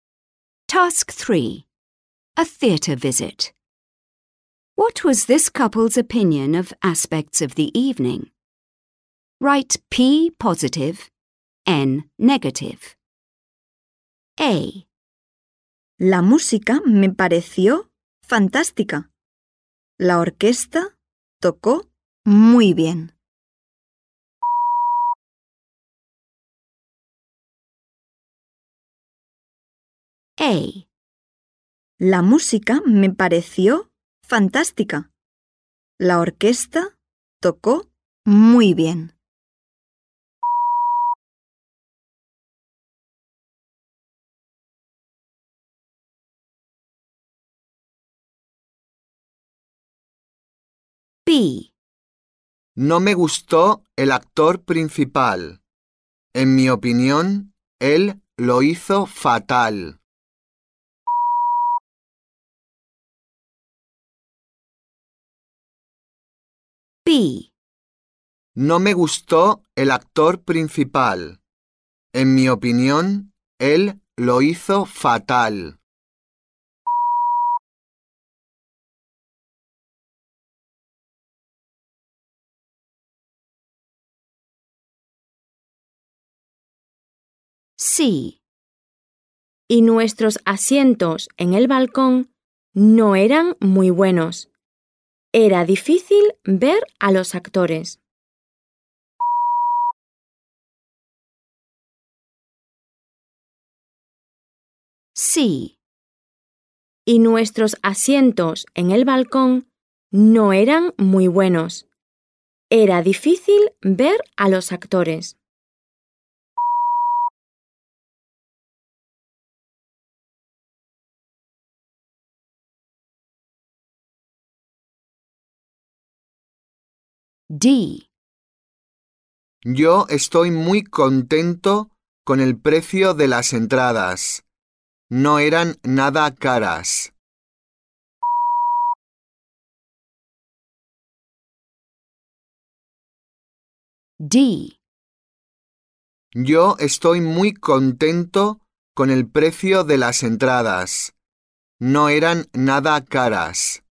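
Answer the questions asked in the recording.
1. P (positive)
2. N (negative)
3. N (negative)
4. P (positive)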